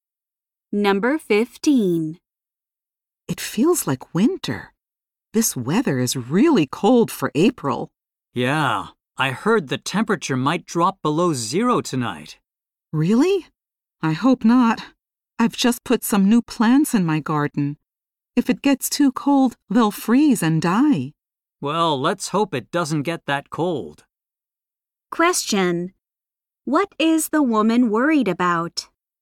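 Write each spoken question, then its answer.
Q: What is the woman worried about?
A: Her new plants freezing and dying in the cold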